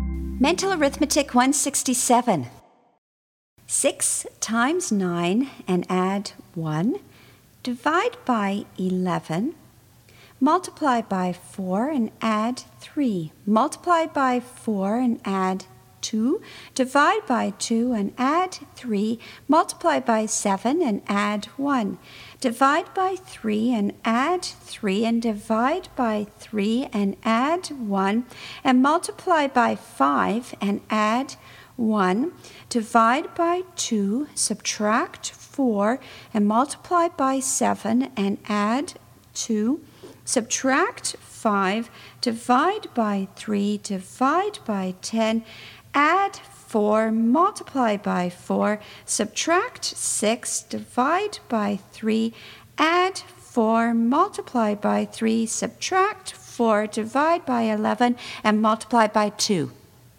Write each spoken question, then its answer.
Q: 6 times 9 and add 1. Divide by 11. Multiply by 4 and add 3. Multiply by 4 and add 2. Divide by 2 and add 3. Multiply by 7 and add 1. Divide by 3 and add 3. And divide by 3 and add 1. And multiply by 5 and add 1. Divide by 2, subtract 4, and multiply by 7 and add 2. Subtract 5, divide by 3, divide by 10, add 4, multiply by 4, subtract 6, divide by 3, add 4, multiply by 3, subtract 4, divide by 11, and multiply by 2.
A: And the answer is 20.